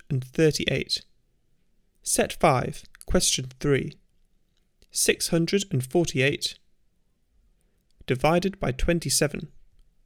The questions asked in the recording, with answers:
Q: 648 divided by 27.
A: Answer 24.